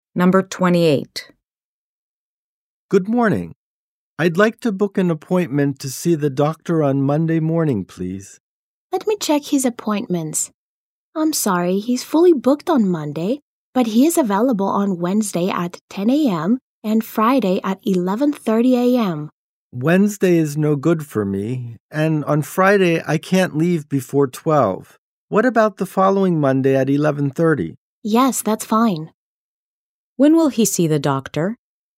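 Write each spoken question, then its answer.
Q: When will he see the doctor?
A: The following Monday at 11:30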